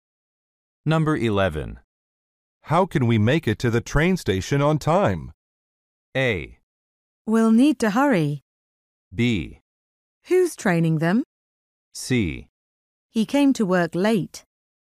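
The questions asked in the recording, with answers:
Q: How can we make it to the train station on time?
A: A: We'll need to hurry.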